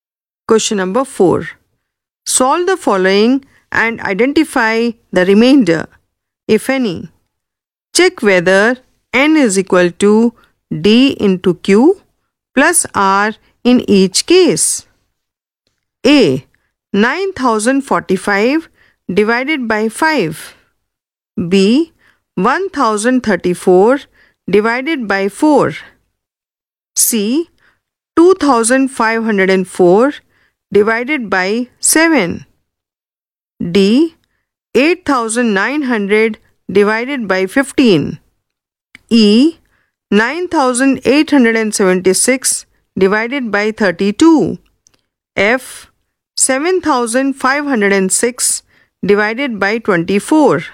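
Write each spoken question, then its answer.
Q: 9045 divided by 5.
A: 1809, remainder 0

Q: B. 1034 divided by 4.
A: 258, remainder 2

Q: 2504 divided by 7.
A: 357, remainder 5

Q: D. 8900 divided by 15.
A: 593, remainder 5

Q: 9876 divided by 32.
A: 308, remainder 20

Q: F. 7506 divided by 24.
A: 312, remainder 18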